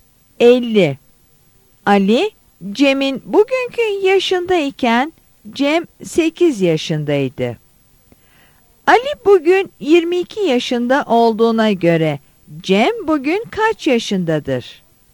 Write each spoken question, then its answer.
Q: Ali bugün 22 yaşında olduğuna göre Cem bugün kaç yaşındadır?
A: Yanıt E'dir.